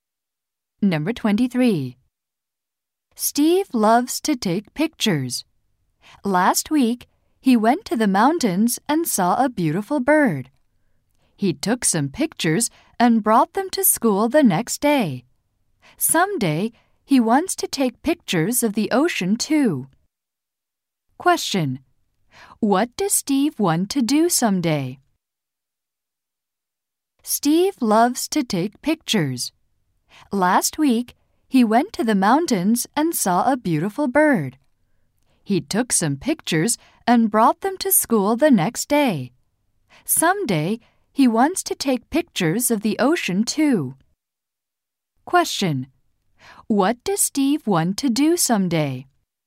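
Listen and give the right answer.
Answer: Take pictures of the ocean.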